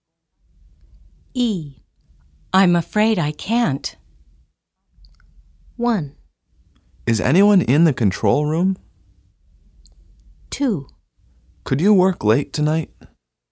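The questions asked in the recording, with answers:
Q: I'm afraid I can't.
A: 2: Could you work late tonight?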